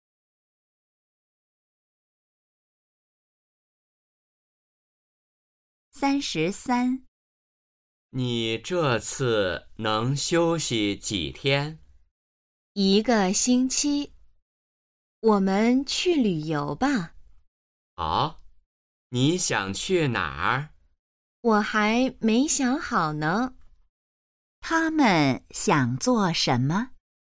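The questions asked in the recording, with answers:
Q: 他们想做什么?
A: 去旅游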